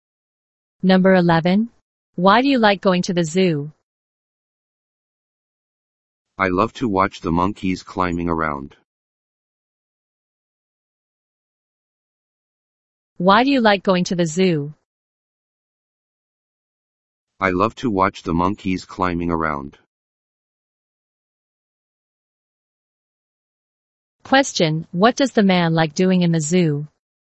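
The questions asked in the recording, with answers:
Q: what does the man like doing in the zoo?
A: Watching the monkeys climbing around.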